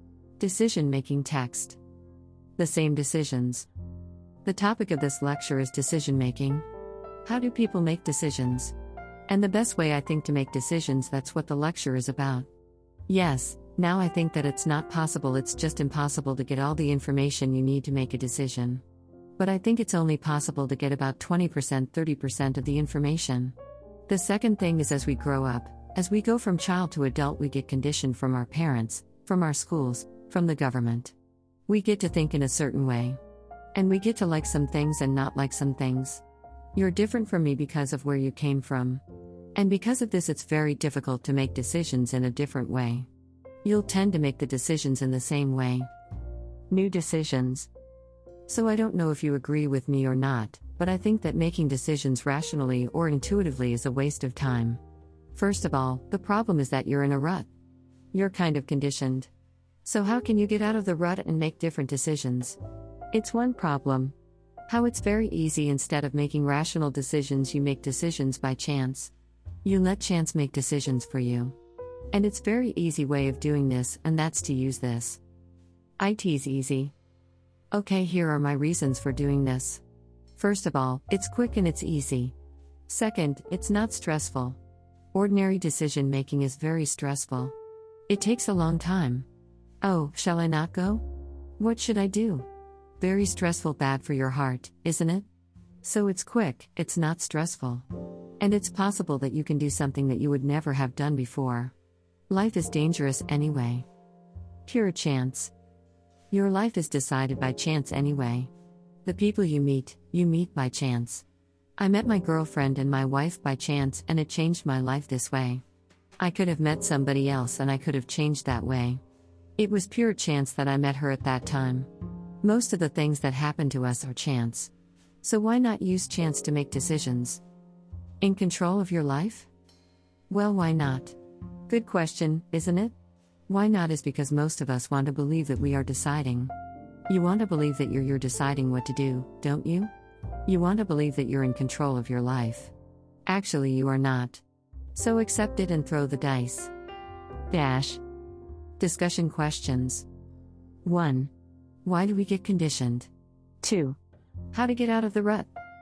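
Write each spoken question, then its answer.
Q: Why do we get conditioned?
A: Because as we grow up we are conditioned by our parents, schools and the government

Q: How to get out of the rut.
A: Make decisions by chance (throw the dice)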